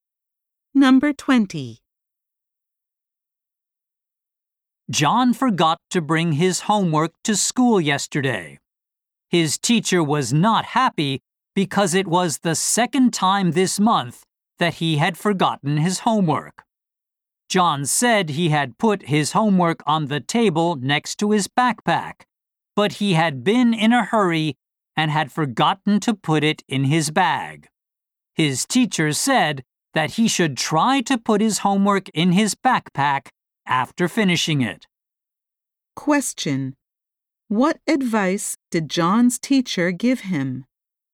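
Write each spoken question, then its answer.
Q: What advice did John's teacher give him?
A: Put his homework in his backpack after finishing it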